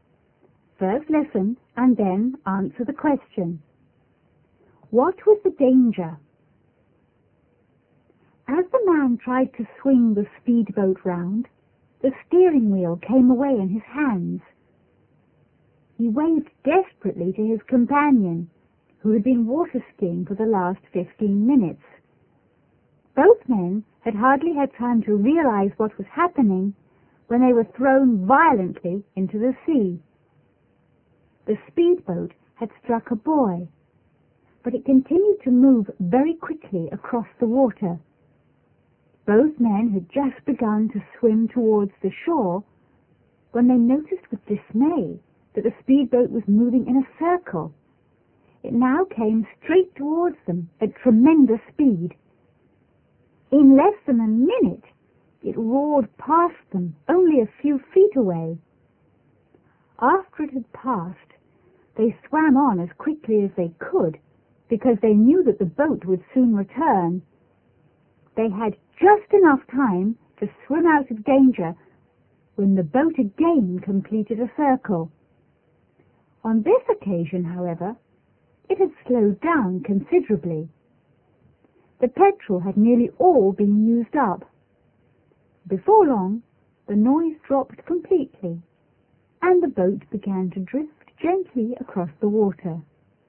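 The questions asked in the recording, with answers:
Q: What was the danger?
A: The out-of-control speedboat kept circling and nearly hit the two men in the water.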